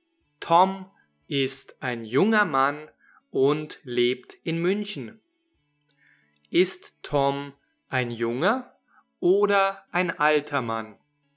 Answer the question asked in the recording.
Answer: Er ist ein junger Mann. Tom ist ein junger Mann.